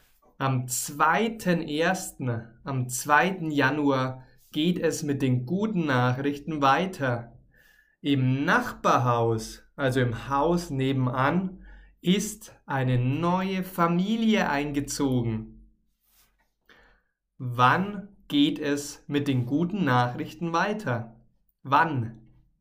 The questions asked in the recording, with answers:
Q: Wann geht es mit den guten Nachrichten weiter?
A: Am 2.1. Genau, am 2. Januar.